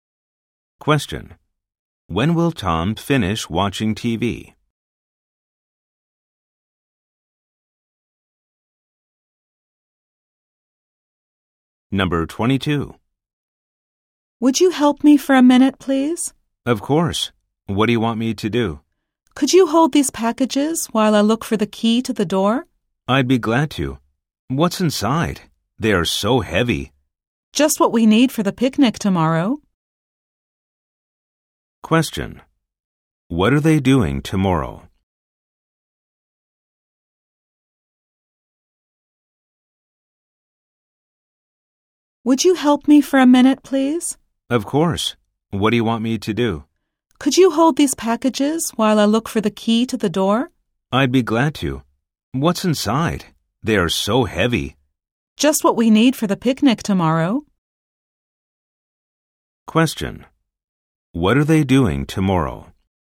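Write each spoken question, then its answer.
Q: What are they doing tomorrow?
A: Having a picnic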